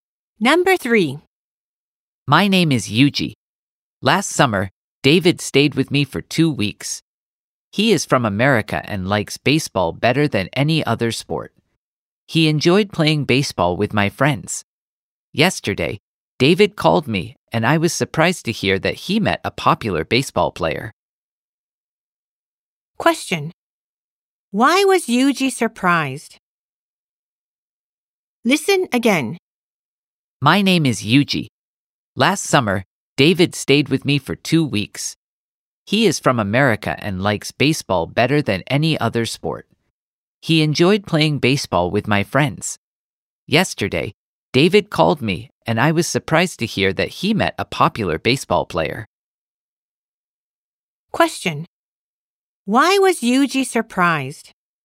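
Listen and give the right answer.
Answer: Because David met a popular baseball player.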